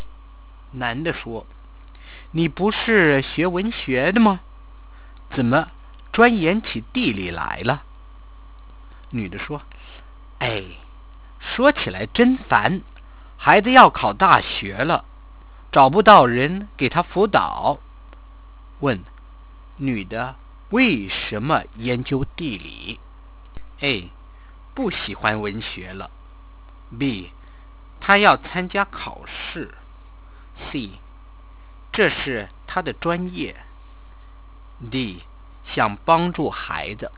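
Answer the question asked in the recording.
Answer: D: 想帮助孩子。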